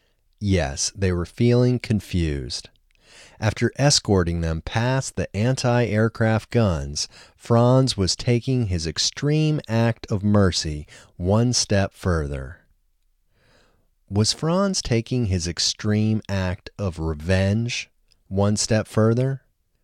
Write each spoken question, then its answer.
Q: Was Franz taking his extreme act of revenge one step further?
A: No, Franz wasn't taking his extreme act of revenge one step further.